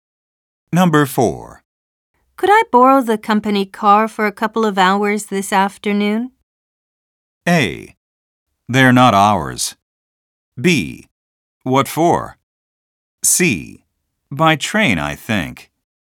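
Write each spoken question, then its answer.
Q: Could I borrow the company car for a couple of hours this afternoon?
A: B: What for?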